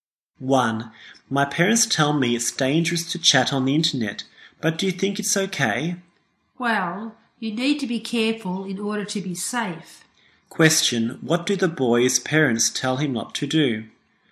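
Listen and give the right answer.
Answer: Chat on the internet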